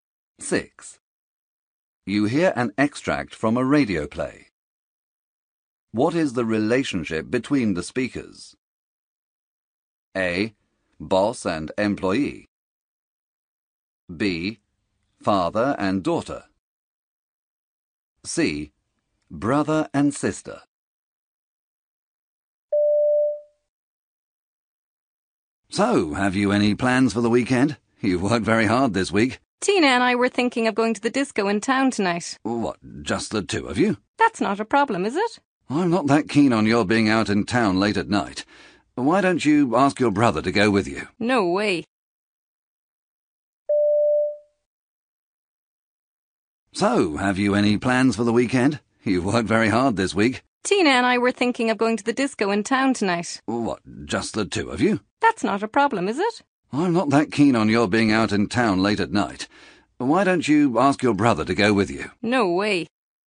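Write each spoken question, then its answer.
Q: What is the relationship between the speakers?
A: B: Father and daughter.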